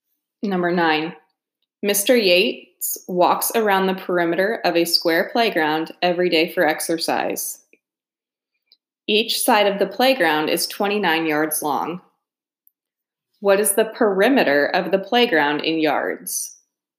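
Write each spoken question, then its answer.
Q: What is the perimeter of the playground in yards?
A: 116 yards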